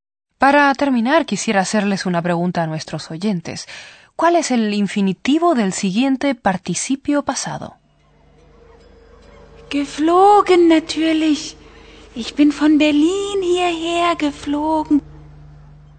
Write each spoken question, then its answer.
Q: ¿Cuál es el infinitivo del siguiente participio pasado?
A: El infinitivo es fliegen, volar.